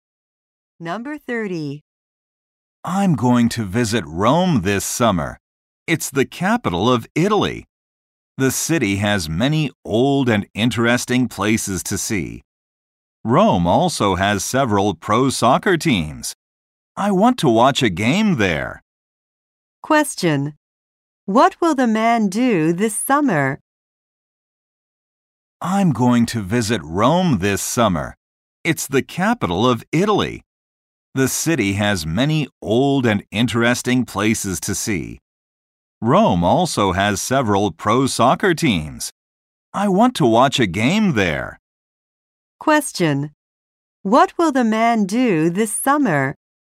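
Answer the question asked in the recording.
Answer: Visit Rome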